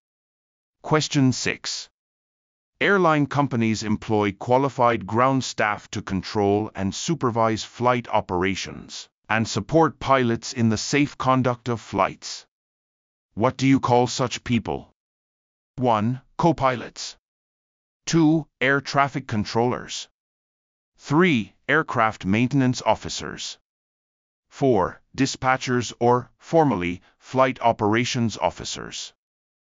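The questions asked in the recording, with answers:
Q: What do you call such people?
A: 4: Dispatchers or, formally, flight operations officers.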